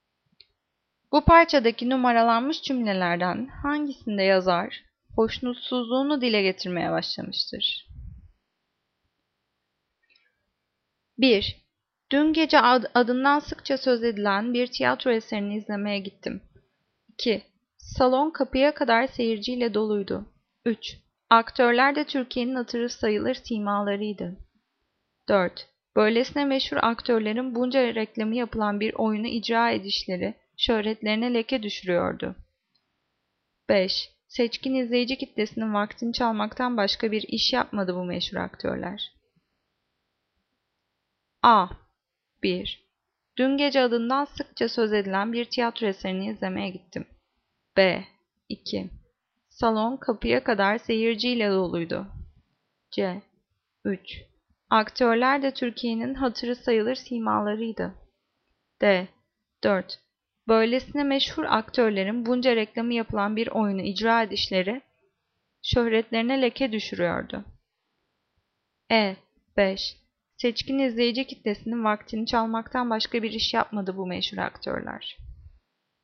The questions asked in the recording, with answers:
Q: Bu parçadaki numaralanmış cümlelerden hangisinde yazar hoşnutsuzluğunu dile getirmeye başlamıştır?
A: Cevap D. 4. Böylesine meşhur aktörlerin bunca reklamı yapılan bir oyunu icra edişleri şöhretlerine leke düşürüyordu.